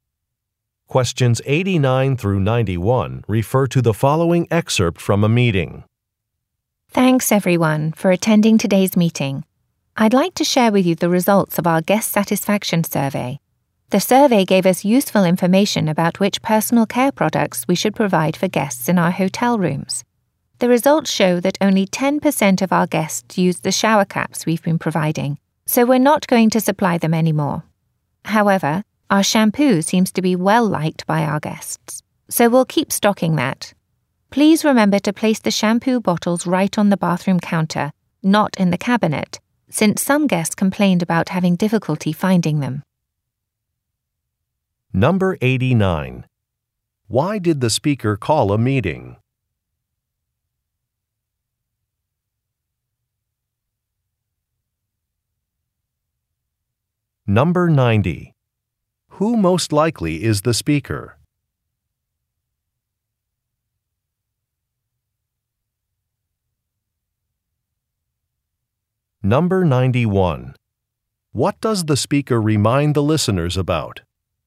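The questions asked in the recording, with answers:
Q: Why did the speaker call a meeting?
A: To share guest survey results

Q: What does the speaker remind the listeners about?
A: To place shampoo bottles on the bathroom counter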